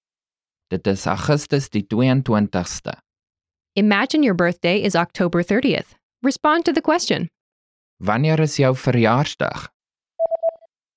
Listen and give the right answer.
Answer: Dit is Oktober die 30ste.